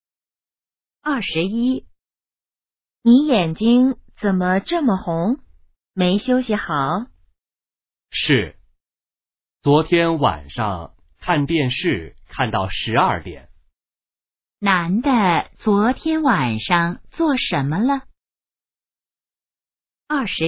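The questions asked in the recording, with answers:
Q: 男的昨天晚上做什么了?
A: 看电视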